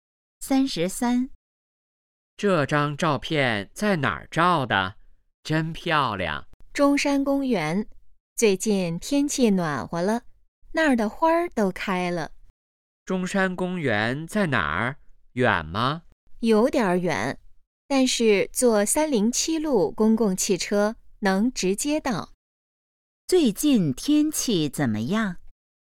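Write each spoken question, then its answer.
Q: 最近天气怎么样?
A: 暖和了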